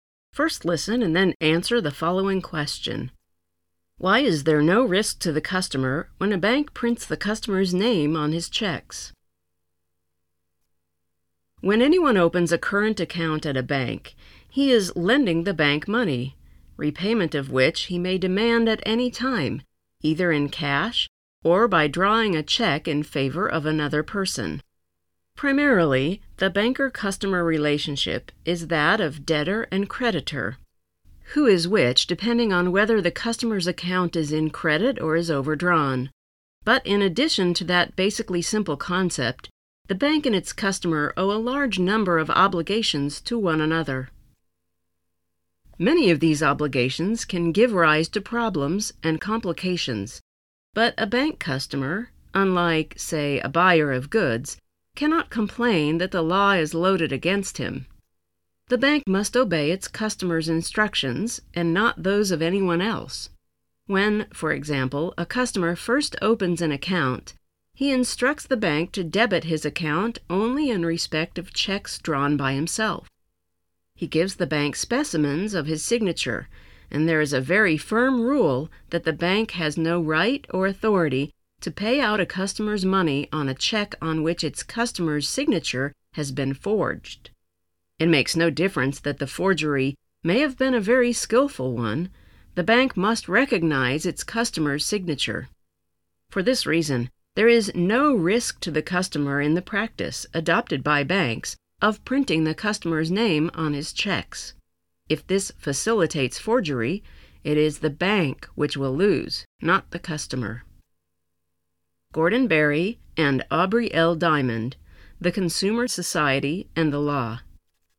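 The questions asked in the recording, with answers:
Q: Why is there no risk to the customer when a bank prints the customer's name on his checks?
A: Because the bank must recognize its customer's signature and, if forgery happens, the bank loses, not the customer.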